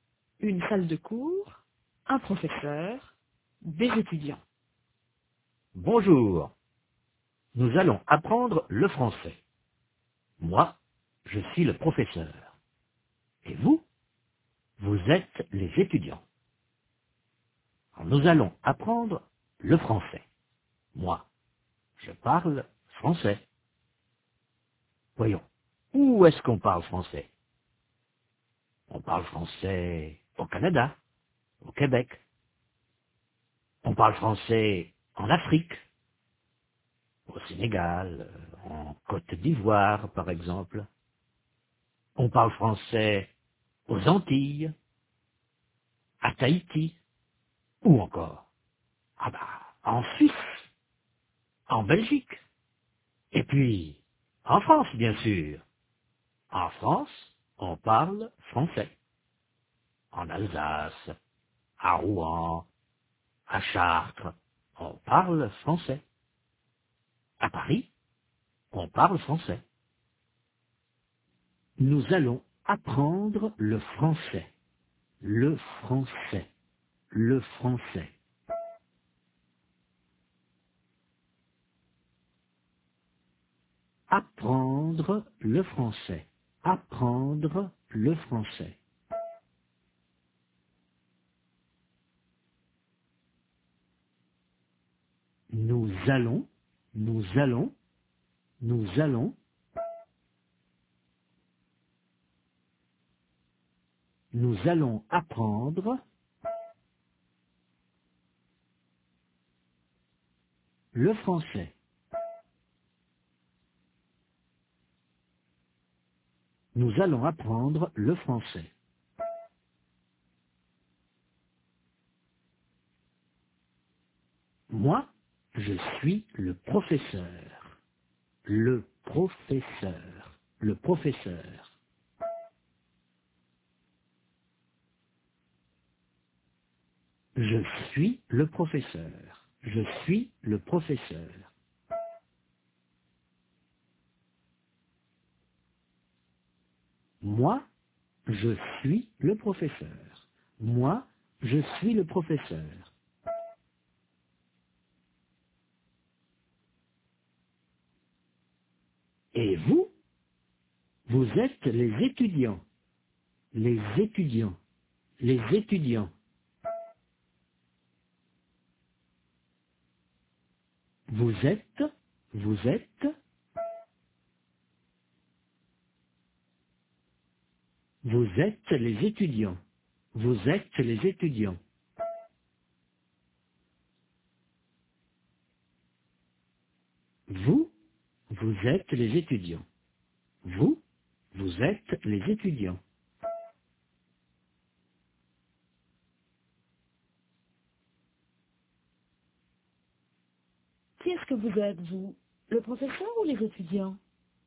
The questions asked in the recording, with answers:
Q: Que vous êtes, vous, le professeur ou les étudiants?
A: Les étudiants.